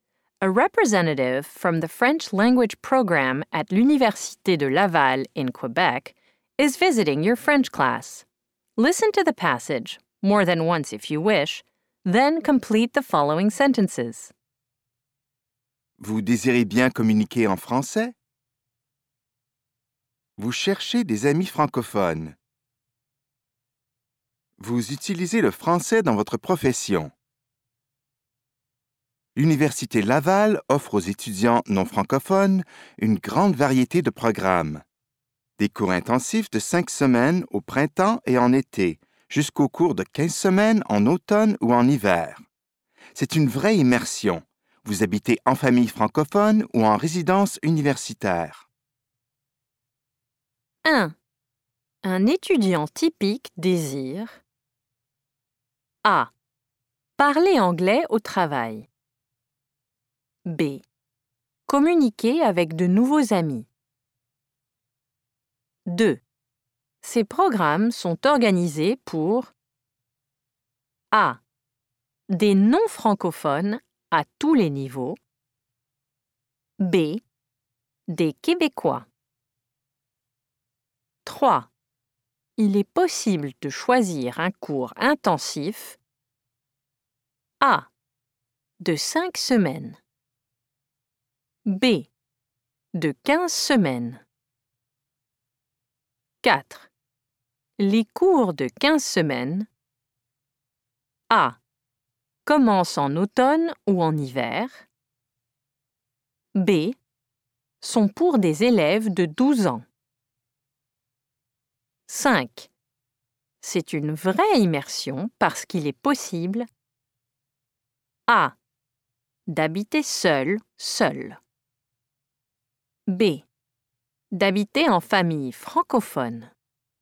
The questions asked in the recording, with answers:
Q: Un étudiant typique désire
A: 1. B.

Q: Ces programmes sont organisés pour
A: 2. A.

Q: Il est possible de choisir un cours intensif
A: 3. A.

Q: Les cours de 15 semaines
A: 4. A.

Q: C'est une vraie immersion parce qu'il est possible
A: 5. B.